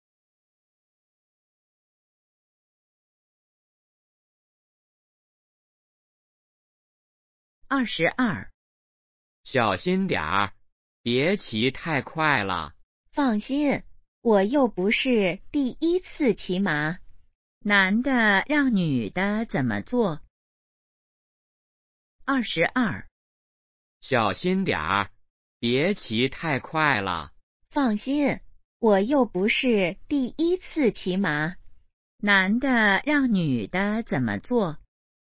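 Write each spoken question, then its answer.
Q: 男的让女的怎么做?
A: 别骑太快,小心点儿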